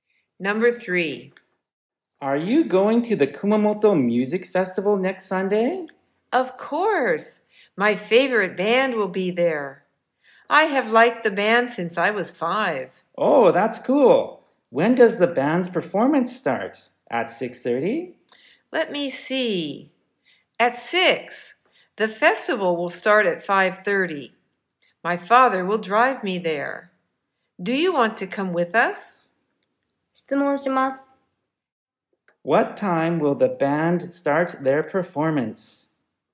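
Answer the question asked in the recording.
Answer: At 6:00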